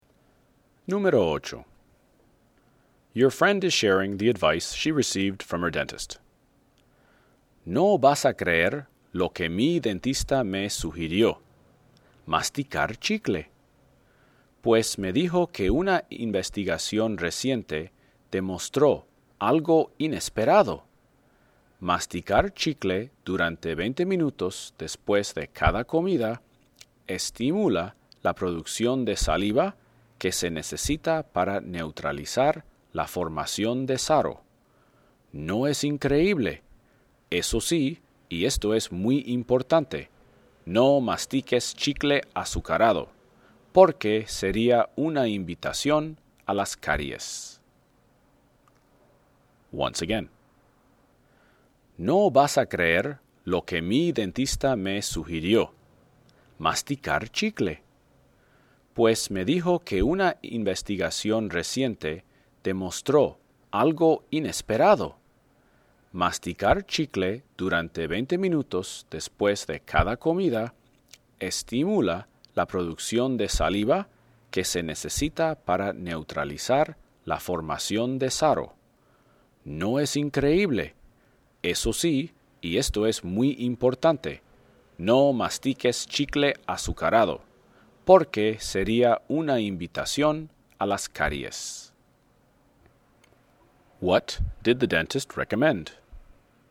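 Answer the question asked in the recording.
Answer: Chewing sugar-free gum for 20 minutes after each meal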